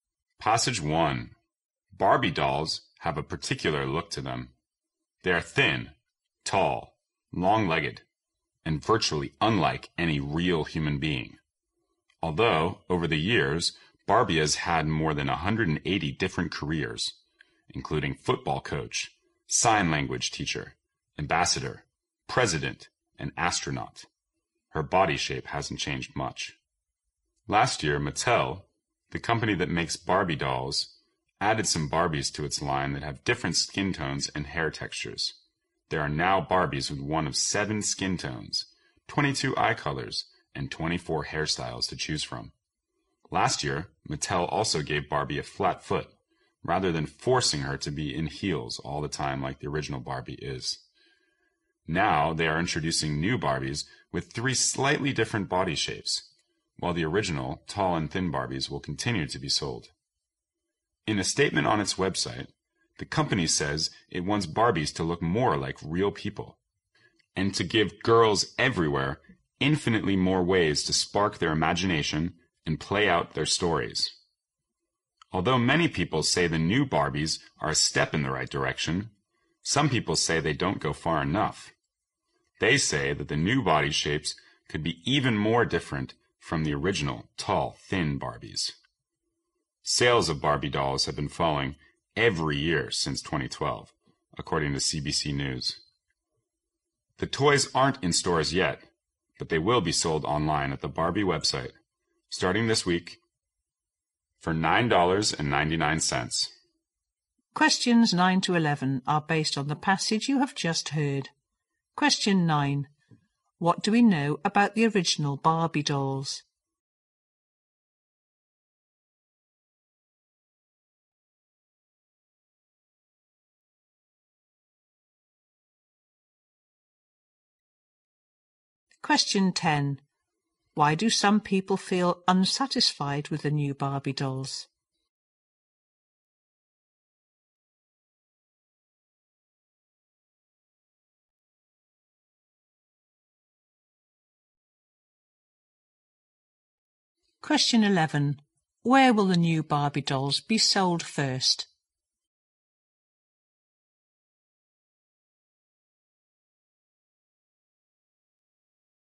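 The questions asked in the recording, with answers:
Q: What do we know about the original Barbie dolls?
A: They are thin, tall and long-legged, unlike real people

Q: Why do some people feel unsatisfied with the new Barbie dolls?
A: The new body shapes are not different enough from the original

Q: Where will the new Barbie dolls be sold first?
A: Online on the Barbie website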